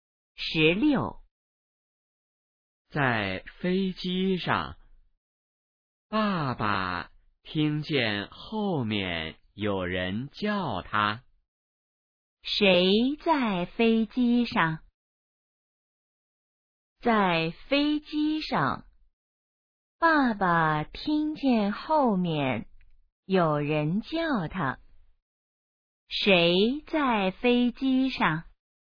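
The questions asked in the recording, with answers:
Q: 谁在飞机上?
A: 爸爸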